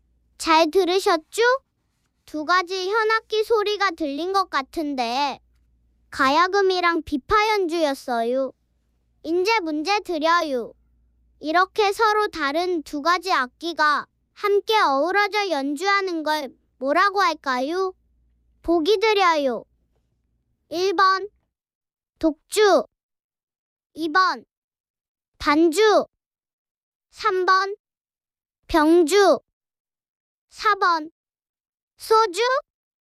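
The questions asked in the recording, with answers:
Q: 이렇게 서로 다른 두 가지 악기가 함께 어우러져 연주하는 걸 뭐라고 할까요?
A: 3: 병주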